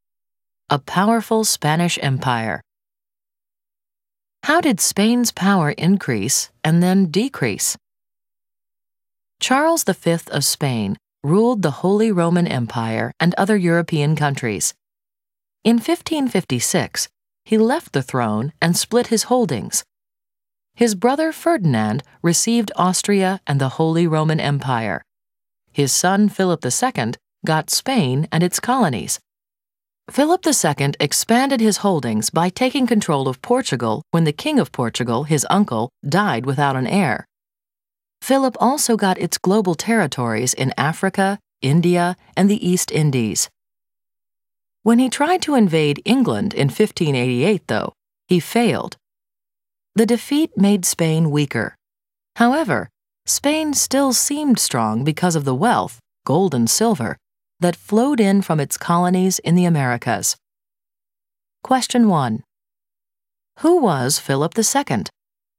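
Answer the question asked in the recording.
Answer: Son of Charles V who ruled Spain, its colonies and Portugal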